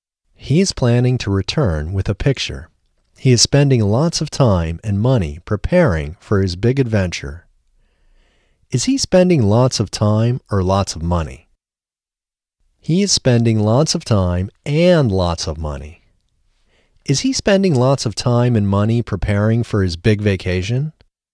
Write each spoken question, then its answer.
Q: Is he spending lots of time and money preparing for his big vacation?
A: No, he isn't spending lots of time and money preparing for his big vacation.